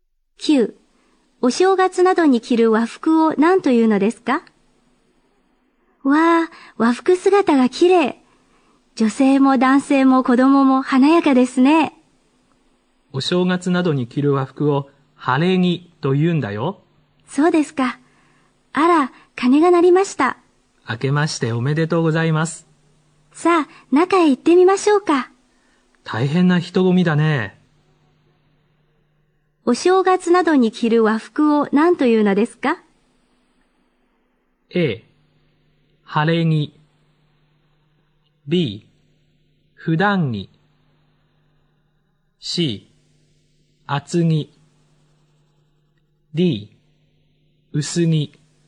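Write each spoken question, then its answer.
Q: お正月などに着る和服を何というのですか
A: A: 晴れ着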